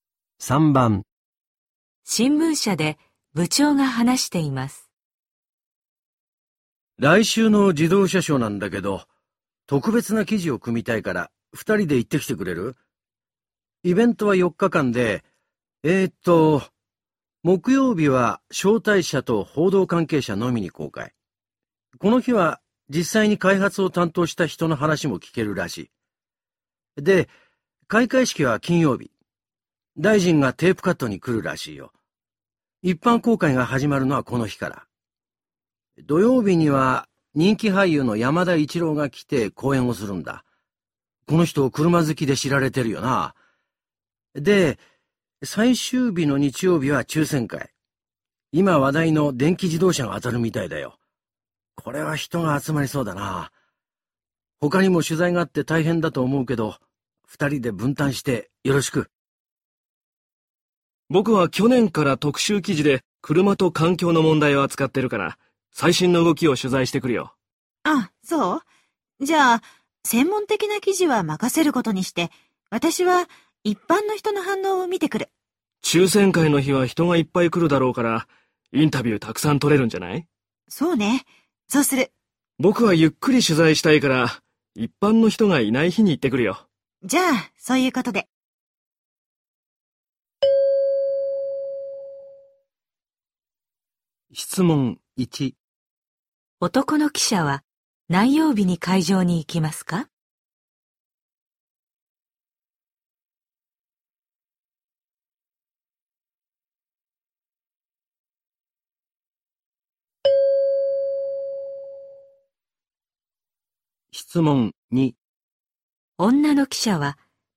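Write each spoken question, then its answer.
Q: 男の記者は何曜日に会場に行きますか?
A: 木曜日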